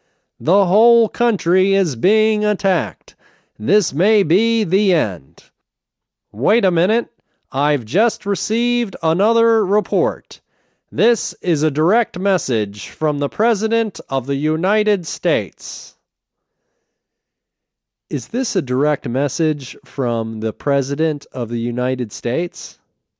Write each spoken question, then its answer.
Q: Is this a direct message from the President of the United States?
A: Yes, this is a direct message from the President of the United States.